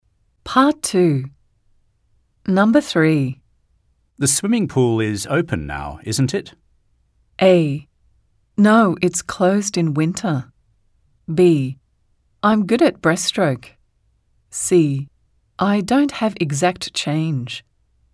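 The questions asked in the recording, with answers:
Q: The swimming pool is open now, isn't it?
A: A: No, it's closed in winter.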